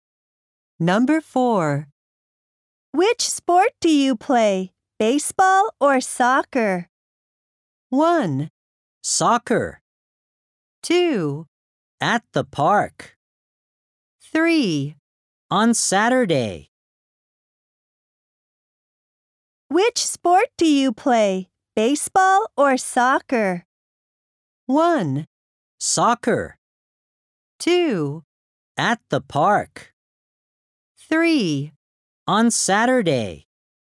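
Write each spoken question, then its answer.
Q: Which sport do you play, baseball or soccer?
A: 1: Soccer.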